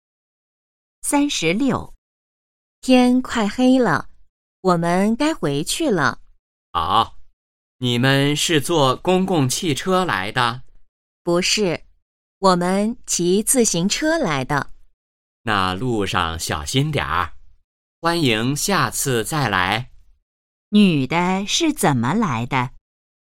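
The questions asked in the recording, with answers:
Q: 女的是怎么来的?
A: 骑自行车来的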